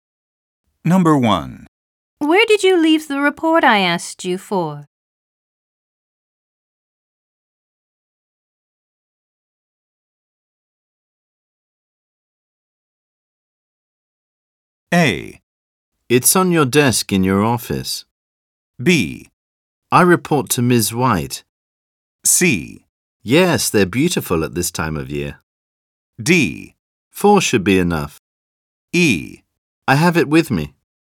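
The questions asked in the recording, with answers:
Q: Where did you leave the report I asked you for?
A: A: It's on your desk in your office. / E: I have it with me.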